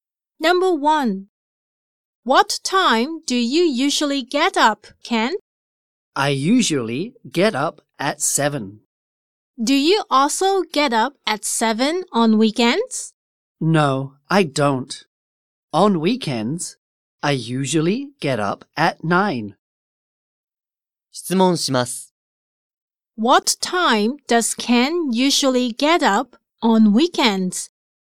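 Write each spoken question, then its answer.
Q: What time does Ken usually get up on weekends?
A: At 9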